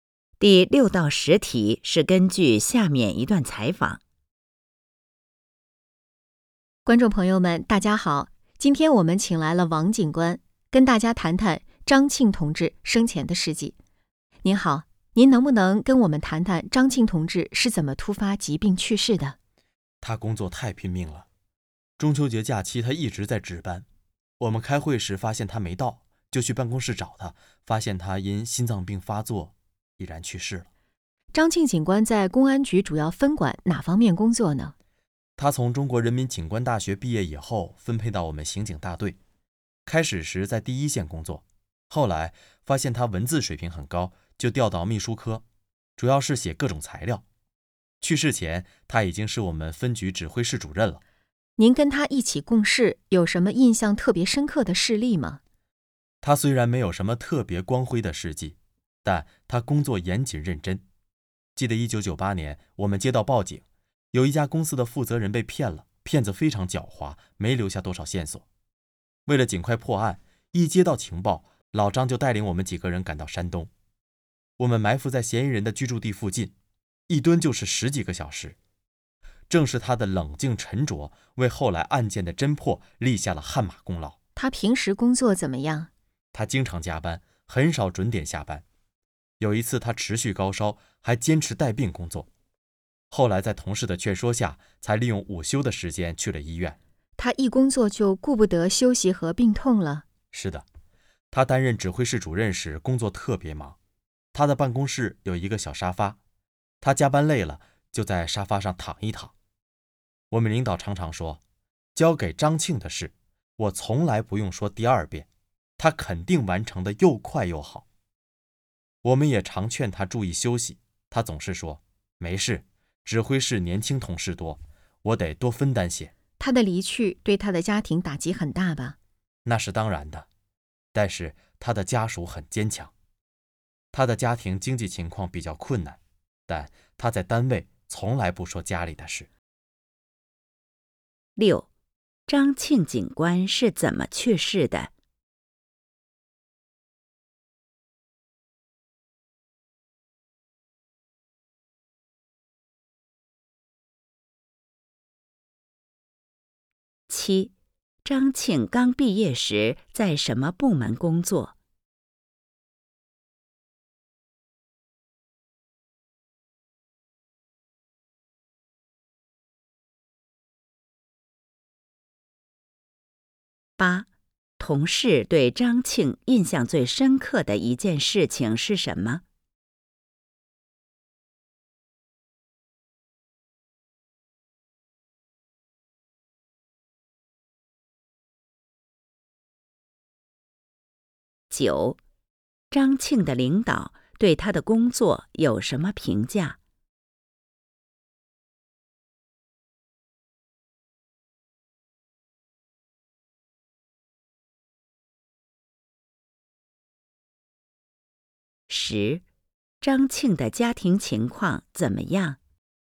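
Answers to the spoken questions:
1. 值班时心脏病发作去世
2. 刑警大队
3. 1998年带队去山东埋伏十几个小时,帮助侦破诈骗案
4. 交给他的事不用说第二遍,完成得又快又好
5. 经济比较困难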